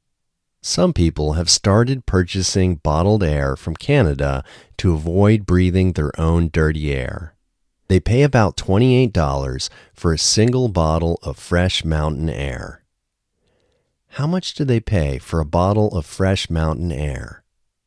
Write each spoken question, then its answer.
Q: How much do they pay for a bottle of fresh mountain air?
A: They pay about $28 for a single bottle of fresh mountain air.